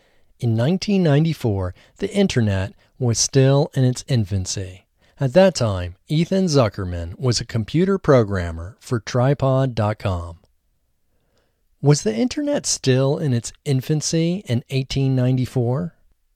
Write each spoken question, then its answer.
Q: Was the internet still in its infancy in 1894?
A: No, the internet wasn't still in its infancy in 1894.